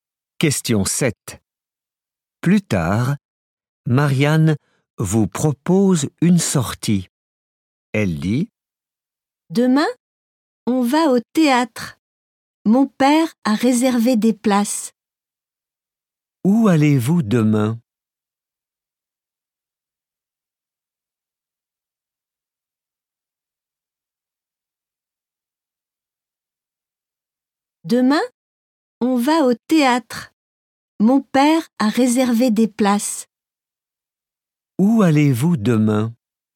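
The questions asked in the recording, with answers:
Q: Où allez-vous demain?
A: Au théâtre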